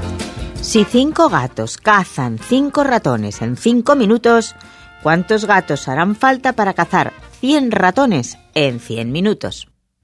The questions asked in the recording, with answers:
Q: Si 5 gatos cazan 5 ratones en 5 minutos, ¿cuántos gatos harán falta para cazar 100 ratones en 100 minutos?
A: Solución 5.